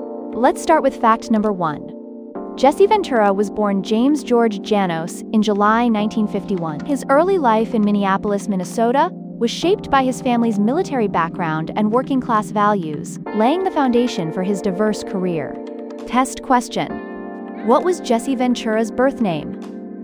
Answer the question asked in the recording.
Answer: James George Janos.